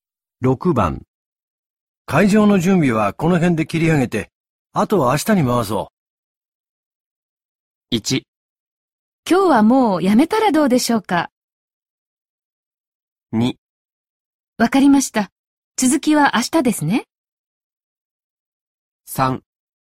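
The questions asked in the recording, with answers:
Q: 会場の準備はこの辺で切り上げて、あとは明日に回そう。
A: 2: わかりました、続きは明日ですね。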